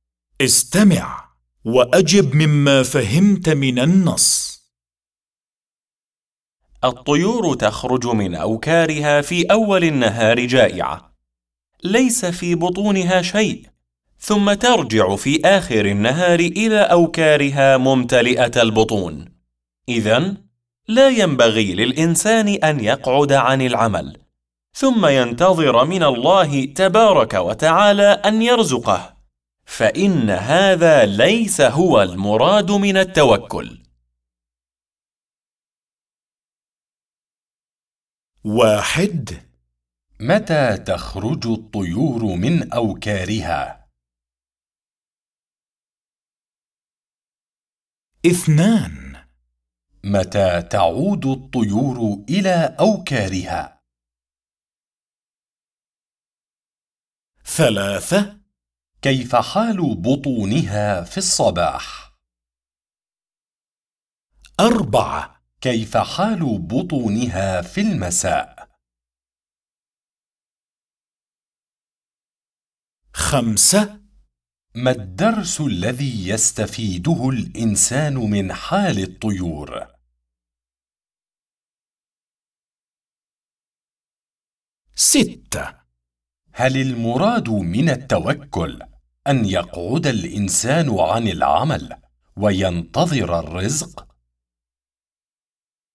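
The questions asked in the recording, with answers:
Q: متى تخرج الطيور من أوكارها؟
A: في أول النهار

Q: متى تعود الطيور إلى أوكارها؟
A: في آخر النهار

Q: كيف حال بطونها في الصباح؟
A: جائعة، ليس في بطونها شيء

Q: كيف حال بطونها في المساء؟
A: ممتلئة

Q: ما الدرس الذي يستفيده الإنسان من حال الطيور؟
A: ألا يقعد عن العمل وينتظر الرزق، بل يعمل ويتوكل على الله

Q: هل المراد من التوكل أن يقعد الإنسان عن العمل وينتظر الرزق؟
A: لا، ليس هذا هو المراد من التوكل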